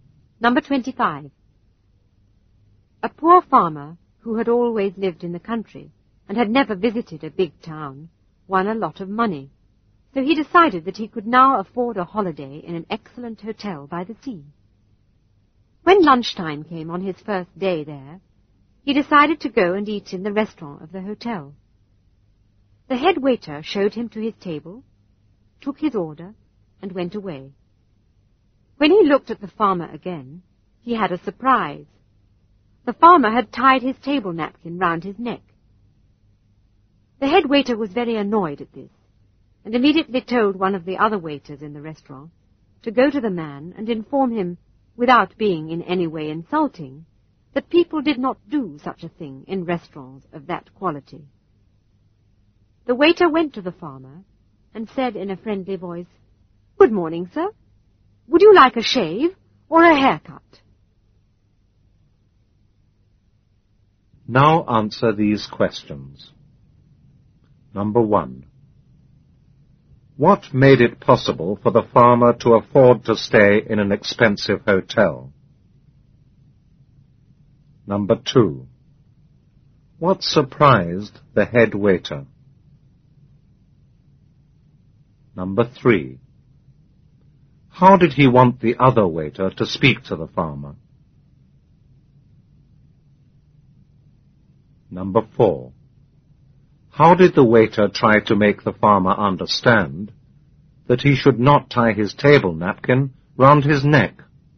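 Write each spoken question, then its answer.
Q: What made it possible for the farmer to afford to stay in an expensive hotel?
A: He had won a lot of money.

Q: What surprised the head waiter?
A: The farmer had tied his table napkin round his neck.

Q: How did he want the other waiter to speak to the farmer?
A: Without being in any way insulting.

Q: How did the waiter try to make the farmer understand that he should not tie his table napkin round his neck?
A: He asked him in a friendly voice whether he would like a shave or a haircut.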